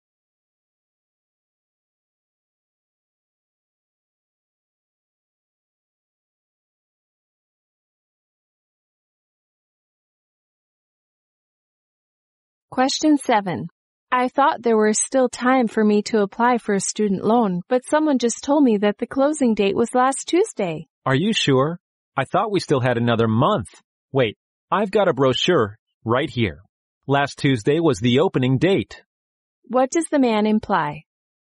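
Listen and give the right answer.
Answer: The woman can still apply for the loan, since last Tuesday was the opening date.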